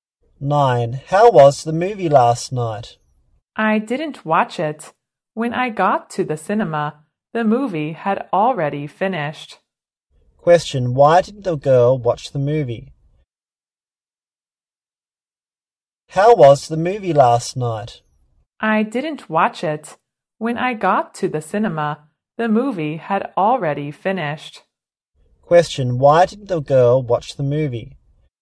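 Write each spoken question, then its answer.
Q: Why didn't the girl watch the movie?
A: The movie had already finished when she got to the cinema.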